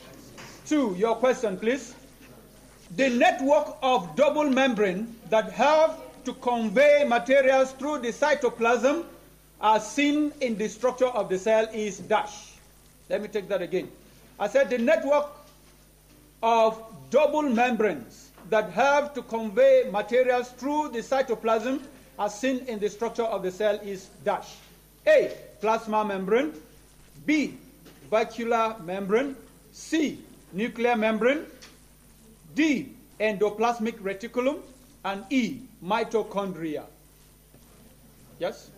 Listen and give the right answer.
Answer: The correct answer is D, which is endoplasmic reticulum.